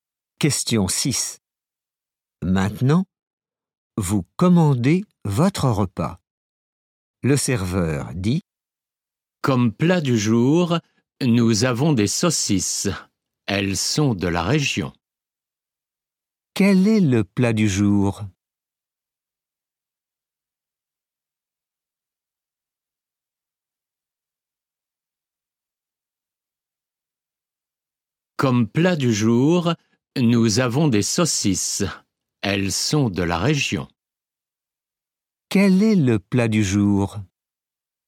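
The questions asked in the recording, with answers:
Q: Quel est le plat du jour?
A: Des saucisses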